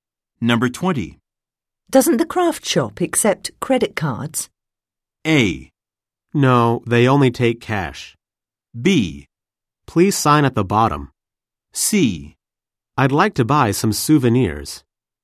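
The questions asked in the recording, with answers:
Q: Doesn't the craft shop accept credit cards?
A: A: No, they only take cash.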